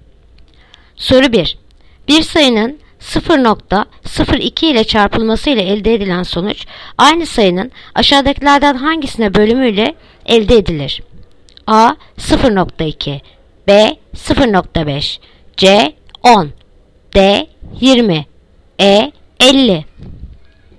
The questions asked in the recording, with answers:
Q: Bir sayının 0.02 ile çarpılması ile elde edilen sonuç aynı sayının aşağıdakilerden hangisine bölümüyle elde edilir?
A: Yanıt Edirne 50.